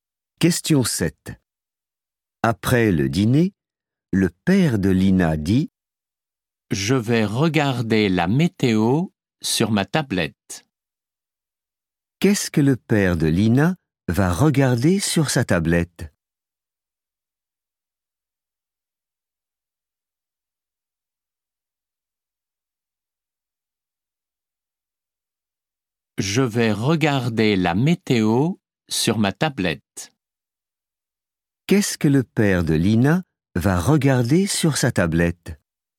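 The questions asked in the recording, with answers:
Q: Qu'est-ce que le père de Lina va regarder sur sa tablette?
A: la météo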